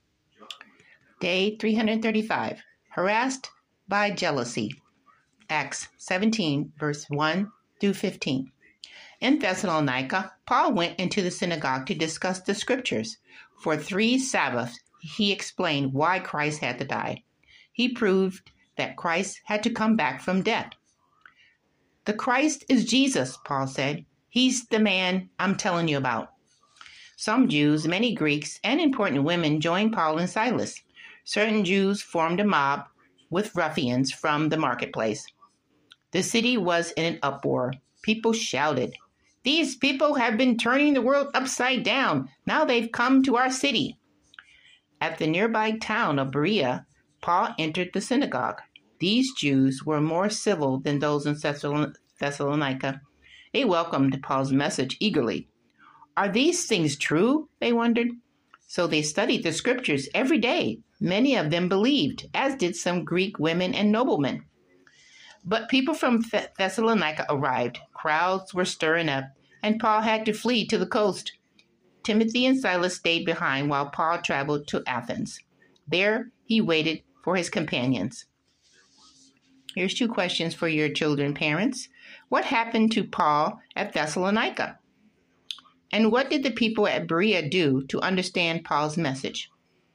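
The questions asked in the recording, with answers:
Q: What happened to Paul at Thessalonica?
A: Jealous Jews formed a mob and the city was in an uproar against him

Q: And what did the people at Berea do to understand Paul's message?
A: They studied the scriptures every day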